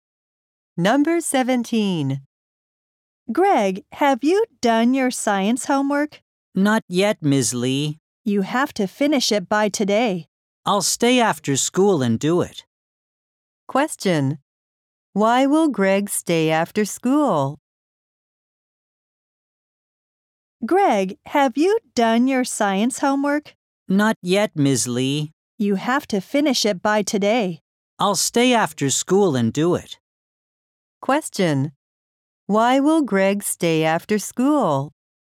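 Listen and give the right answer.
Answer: To finish his science homework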